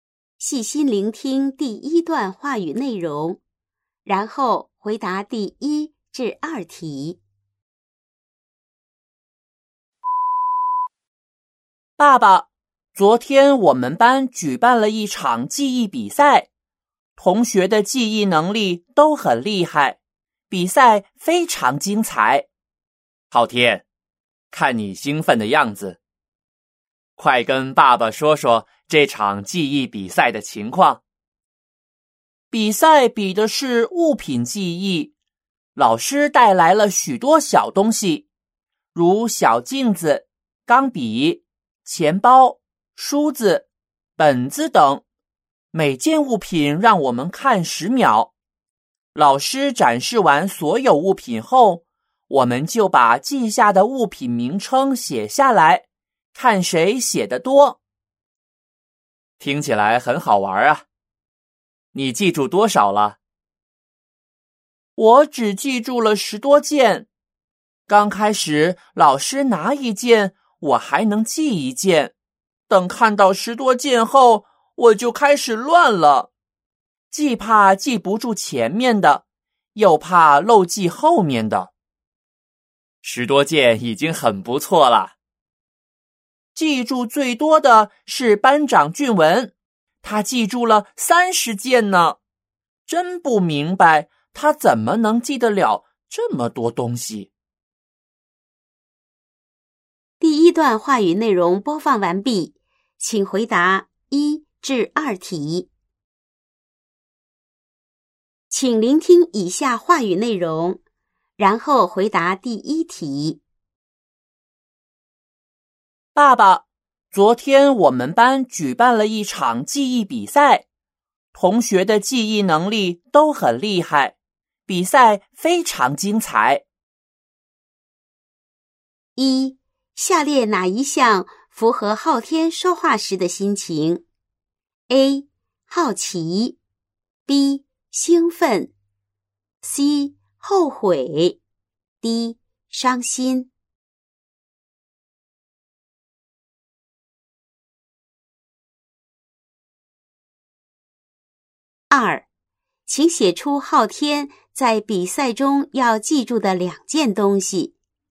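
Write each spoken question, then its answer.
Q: 请写出昊天在比赛中要记住的两件东西。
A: 小镜子、钢笔(或钱包、梳子、本子)

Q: 下列哪一项符合昊天说话时的心情?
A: B: 兴奋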